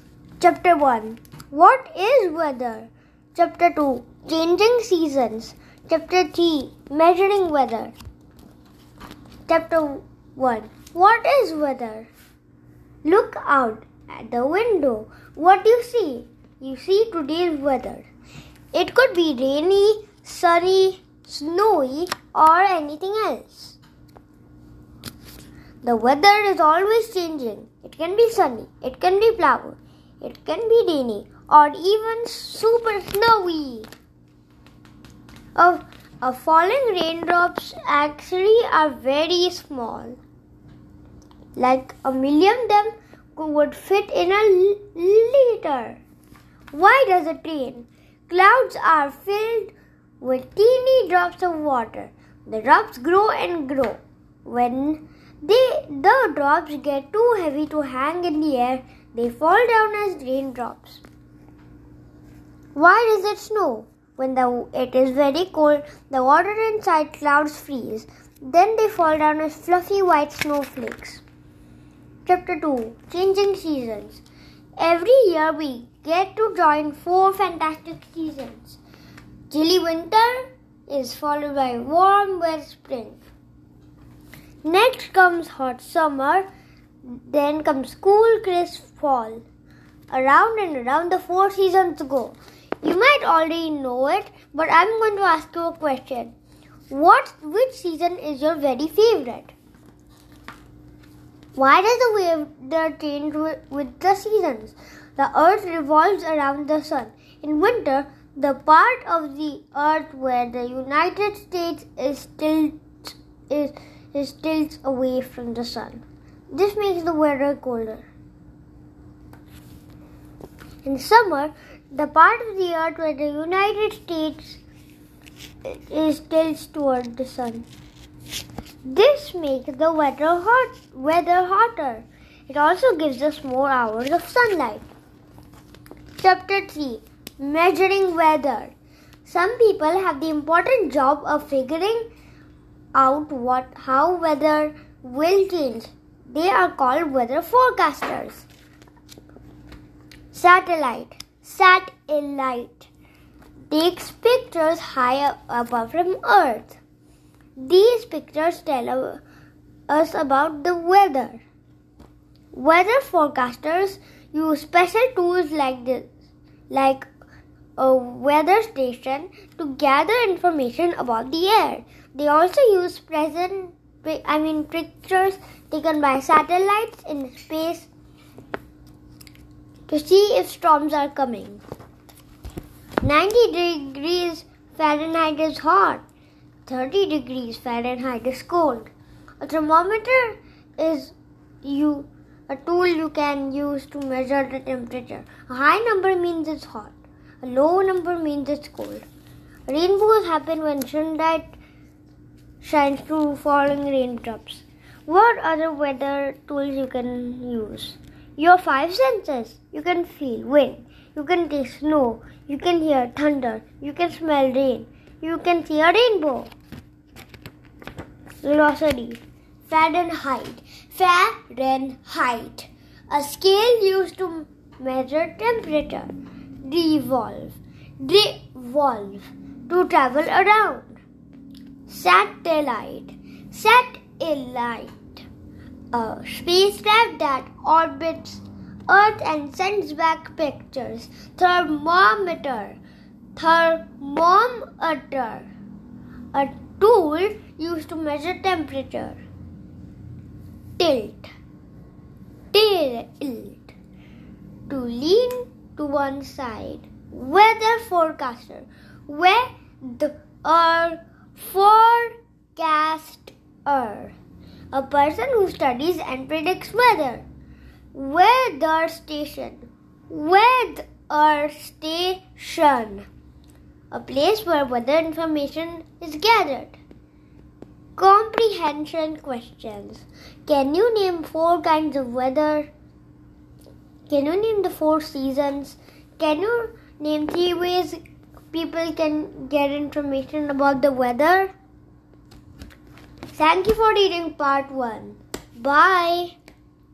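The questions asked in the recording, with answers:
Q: Can you name four kinds of weather?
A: Sunny, cloudy, rainy, snowy

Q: Can you name the four seasons?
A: Winter, spring, summer, fall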